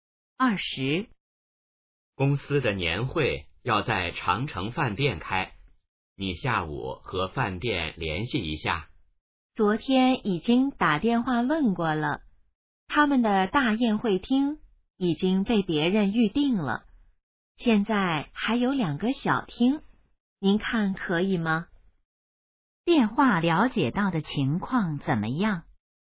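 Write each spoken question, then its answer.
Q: 电话了解到的情况怎么样?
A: 大宴会厅已被预定,只剩两个小厅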